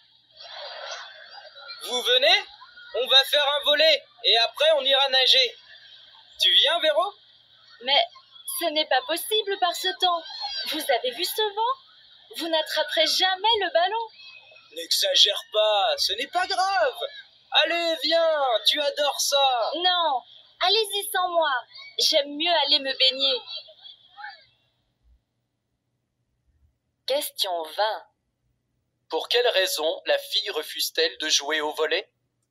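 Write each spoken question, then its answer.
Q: Pour quelle raison la fille refuse-t-elle de jouer au volet ?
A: Parce qu'il y a trop de vent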